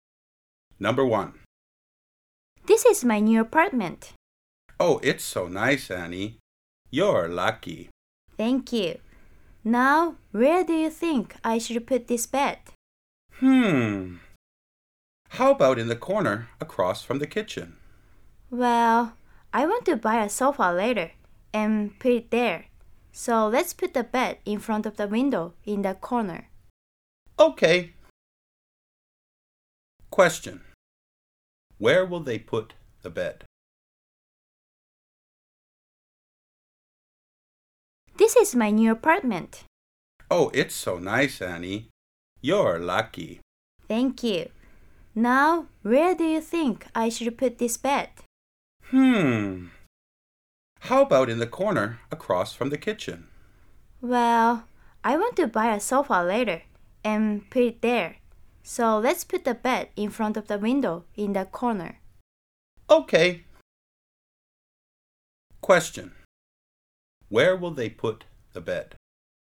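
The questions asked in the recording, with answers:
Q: Where will they put the bed?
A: In the corner in front of the window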